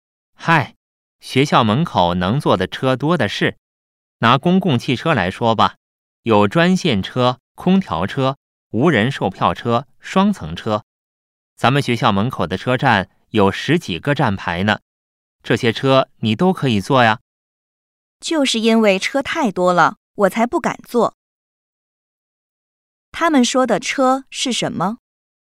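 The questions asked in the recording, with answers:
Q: 他们说的车是什么?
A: 学校门口的公共汽车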